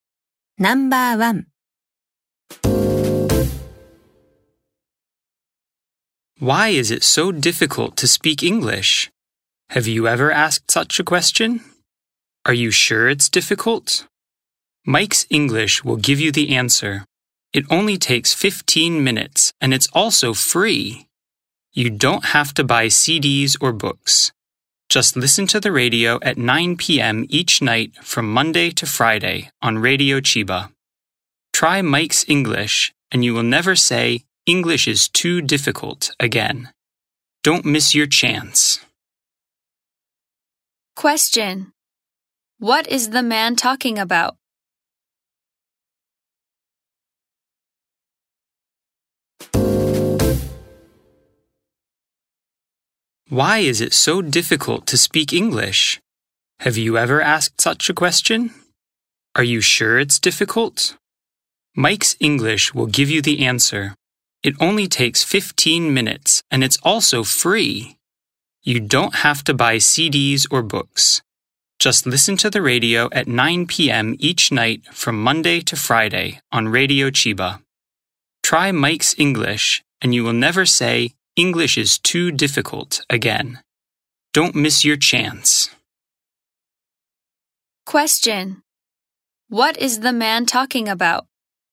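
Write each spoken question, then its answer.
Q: What is the man talking about?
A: A radio English program, Mike's English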